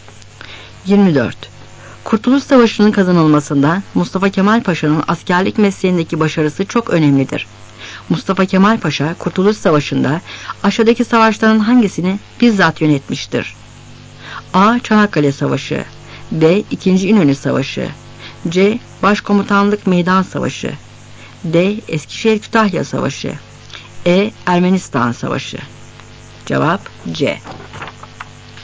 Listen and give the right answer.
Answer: Cevap C.